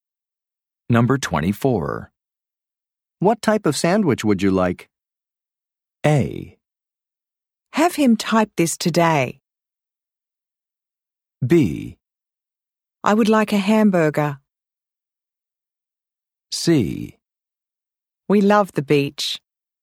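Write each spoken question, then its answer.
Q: What type of sandwich would you like?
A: B: I would like a hamburger.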